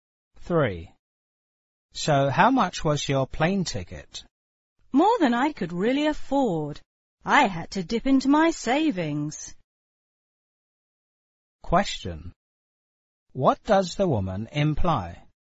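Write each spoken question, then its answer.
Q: What does the woman imply?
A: The ticket was very expensive, so she had to use her savings.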